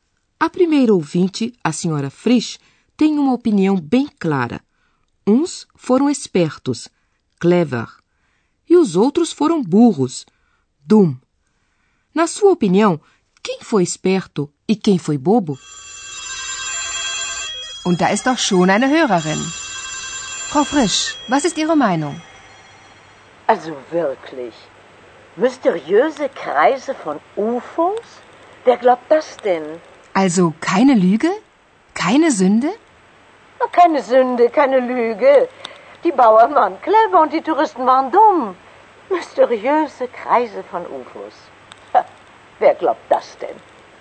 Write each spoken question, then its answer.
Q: Na sua opinião, quem foi esperto e quem foi bobo?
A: Na opinião da senhora Frisch, os agricultores, Bauern, foram espertos e os turistas, burros.